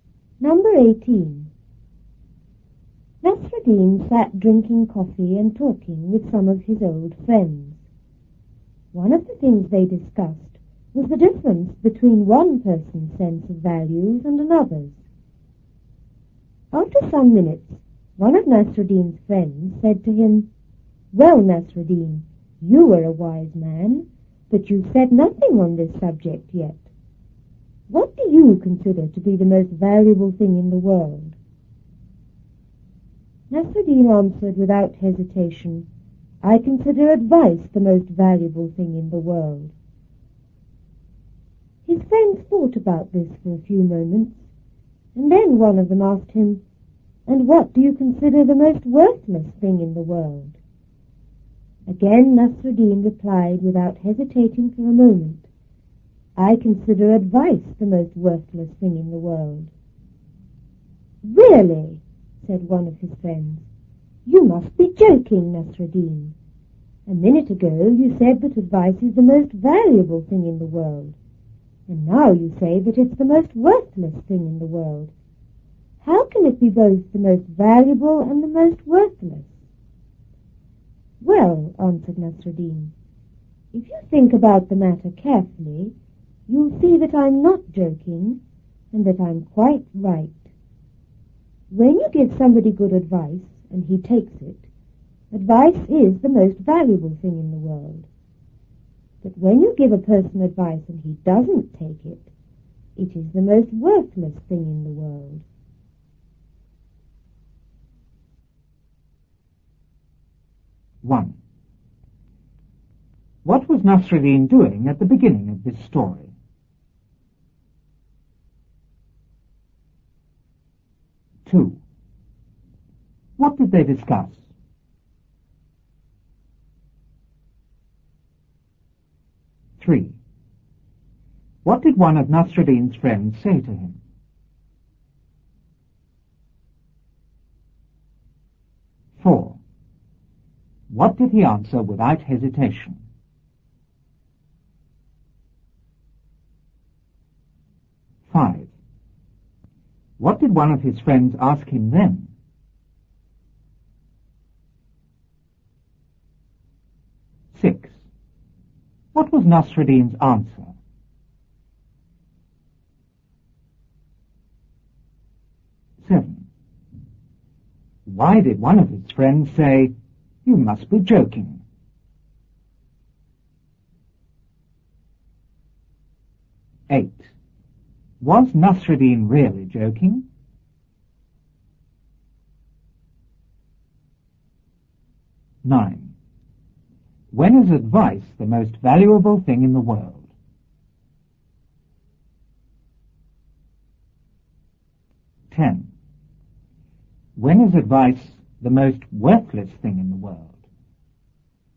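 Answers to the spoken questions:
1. Drinking coffee and talking with some of his old friends
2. The difference between one person's sense of values and another's
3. He asked what Nasruddin considered the most valuable thing in the world
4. That advice is the most valuable thing in the world
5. What he considered the most worthless thing in the world
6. Advice is the most worthless thing in the world
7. Because he had said advice was both the most valuable and the most worthless thing
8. No
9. When you give someone good advice and he takes it
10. When you give someone advice and he doesn't take it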